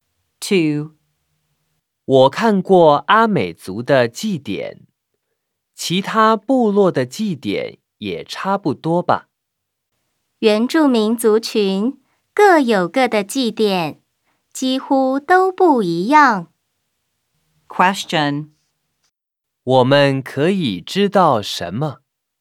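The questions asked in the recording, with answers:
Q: 我们可以知道什么?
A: 原住民各族群的祭典几乎都不一样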